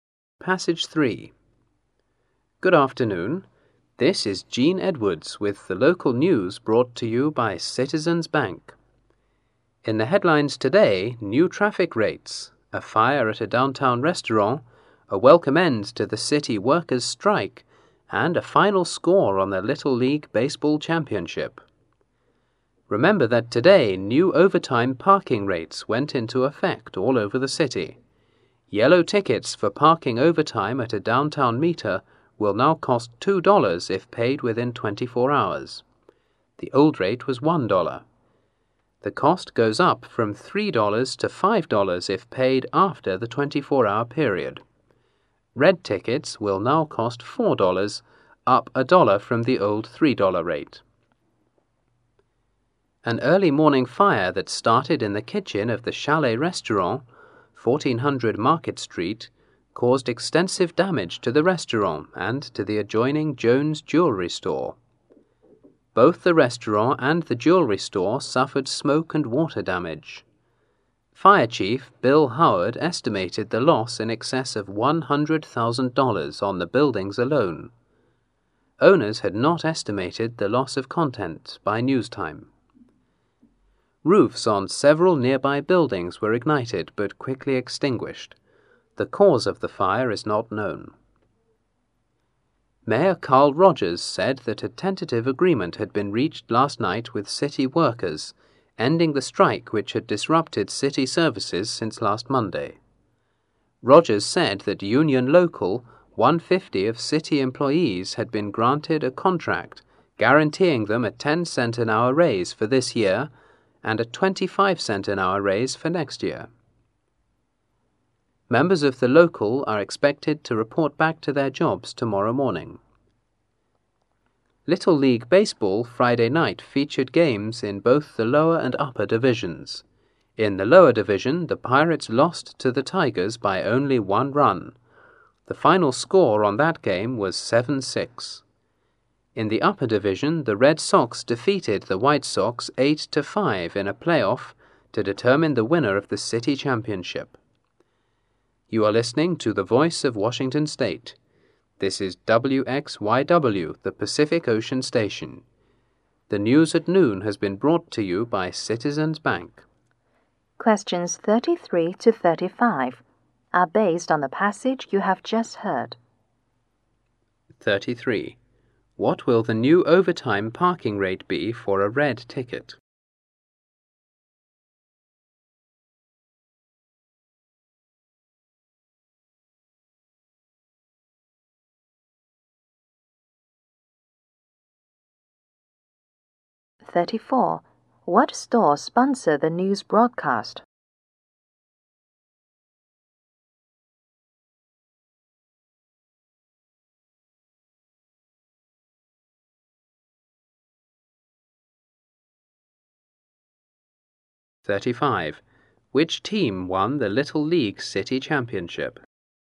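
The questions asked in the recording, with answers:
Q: What store sponsor the news broadcast?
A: Citizens Bank.

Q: Which team won the Little League City Championship?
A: The Red Sox.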